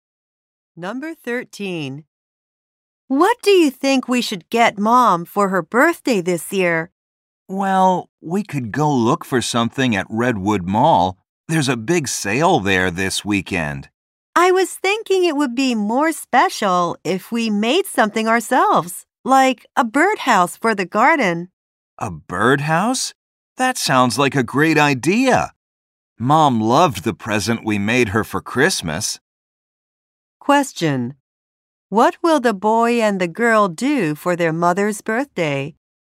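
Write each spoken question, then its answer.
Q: What will the boy and the girl do for their mother's birthday?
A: Make her a birdhouse.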